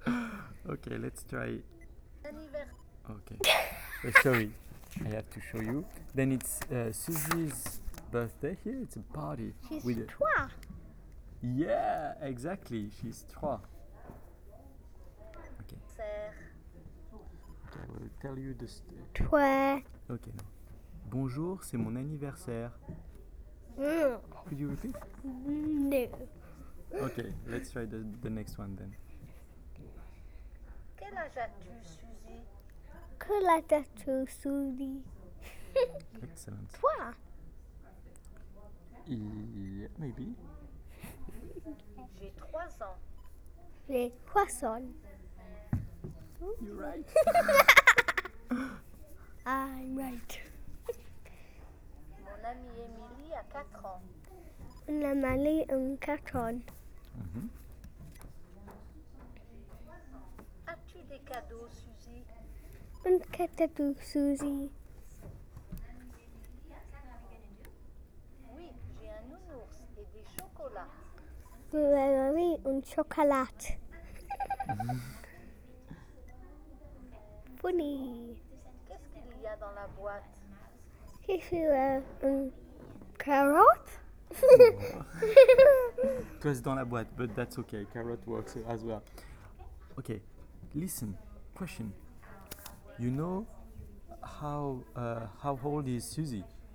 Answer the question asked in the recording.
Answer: Trois.